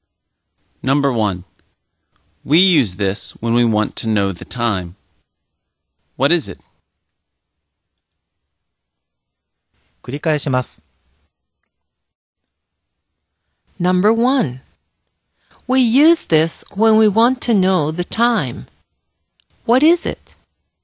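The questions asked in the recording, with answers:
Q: We use this when we want to know the time. What is it?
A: A clock (or watch)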